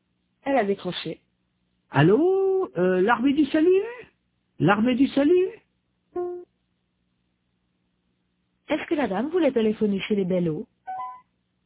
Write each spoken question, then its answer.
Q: Est-ce que la dame voulait téléphoner chez les Bellot?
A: Non, elle voulait l'armée du salut.